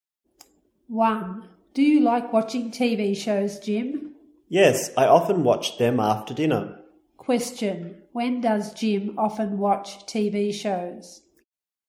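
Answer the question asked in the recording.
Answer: After dinner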